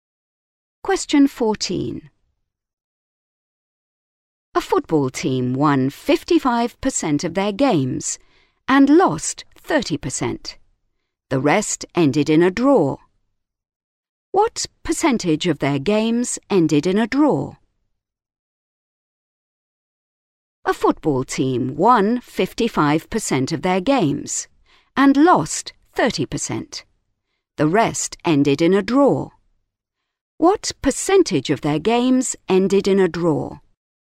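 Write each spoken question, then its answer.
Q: What percentage of their games ended in a draw?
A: 15%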